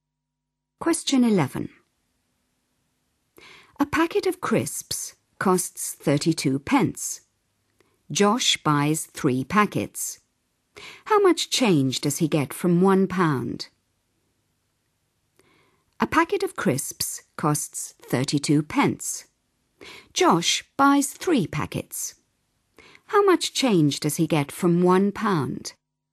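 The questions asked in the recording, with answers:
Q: Josh buys 3 packets. How much change does he get from £1?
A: 4 pence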